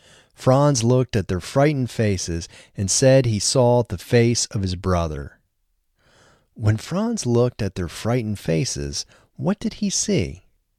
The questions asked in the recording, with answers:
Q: When Franz looked at their frightened faces, what did he see?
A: When Franz looked at their frightened faces, he saw the face of his brother.